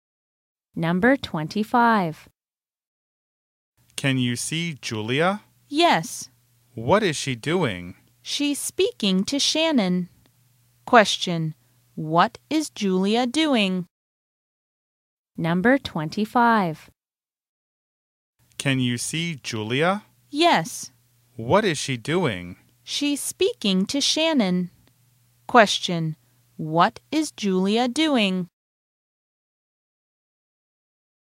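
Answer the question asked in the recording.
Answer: Speaking to Shannon.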